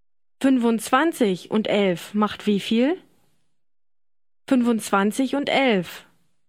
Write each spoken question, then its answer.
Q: 25 und 11 macht wie viel?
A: 36.